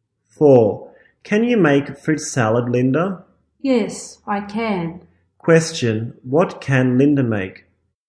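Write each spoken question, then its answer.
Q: What can Linda make?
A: Fruit salad.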